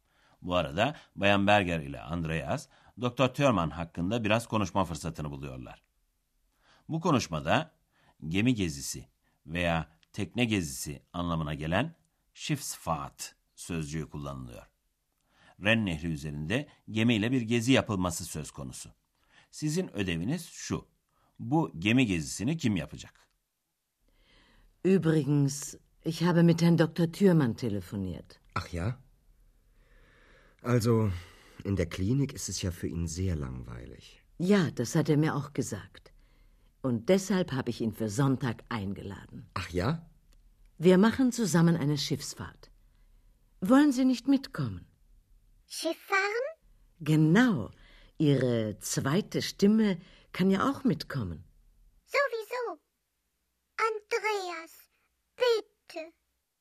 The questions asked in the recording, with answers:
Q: Bu gemi gezisini kim yapacak?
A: Bayan Berger, Doktor Thürmann'ı Ren Nehri'nde gemiyle yapılacak bir geziye davet etmiş.